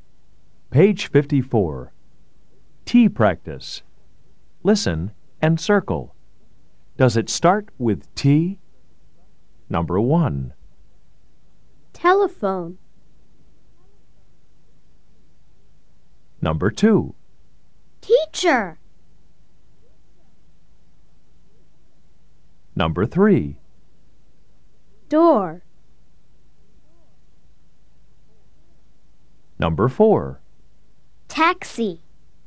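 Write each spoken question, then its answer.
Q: Does it start with T?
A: Yes

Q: Does it start with T?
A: Yes

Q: Does it start with T?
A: No

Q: Does it start with T?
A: Yes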